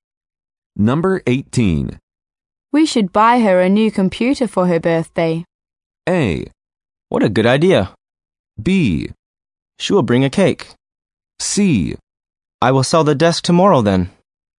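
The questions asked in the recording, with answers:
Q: We should buy her a new computer for her birthday.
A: A: What a good idea.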